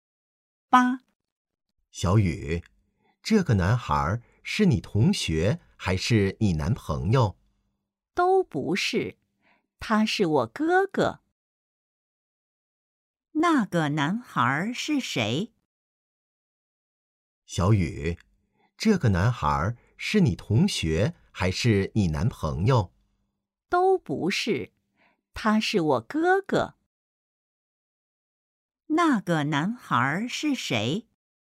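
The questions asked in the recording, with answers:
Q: 那个男孩是谁?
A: 小雨的哥哥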